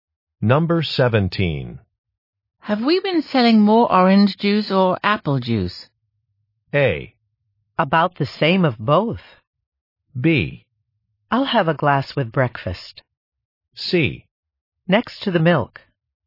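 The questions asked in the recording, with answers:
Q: Have we been selling more orange juice or apple juice?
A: A: About the same of both.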